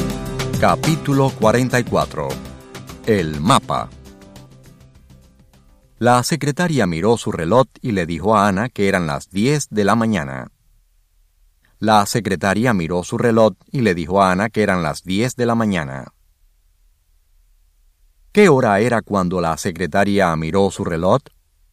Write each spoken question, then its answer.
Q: ¿Qué hora era cuando la secretaria miró su reloj?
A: Eran las 10 de la mañana.